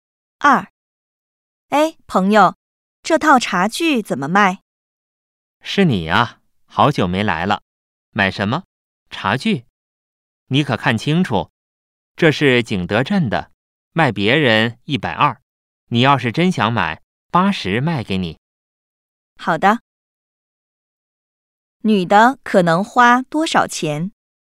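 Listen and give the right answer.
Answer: 80块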